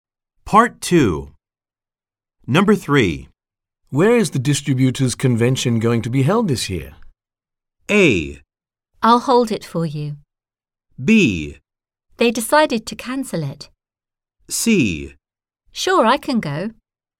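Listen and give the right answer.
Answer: B: They decided to cancel it.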